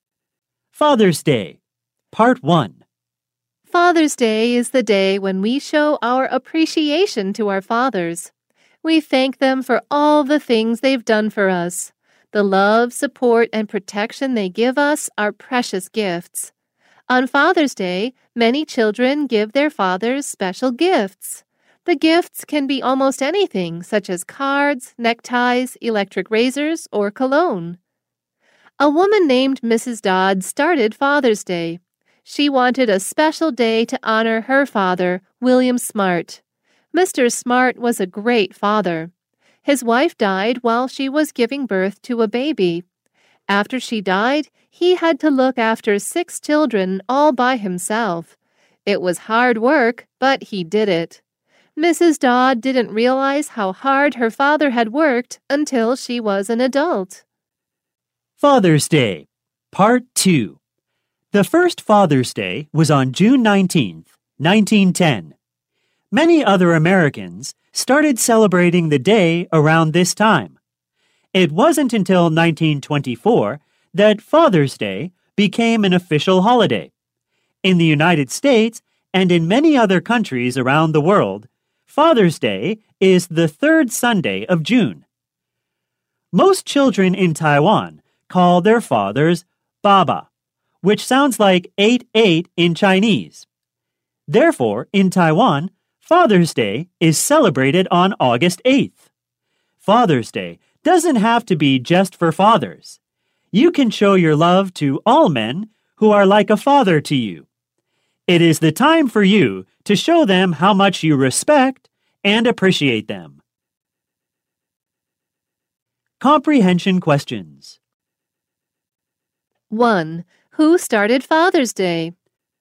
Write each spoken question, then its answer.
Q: Who started Father's Day?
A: A woman named Mrs. Dodd started Father's Day.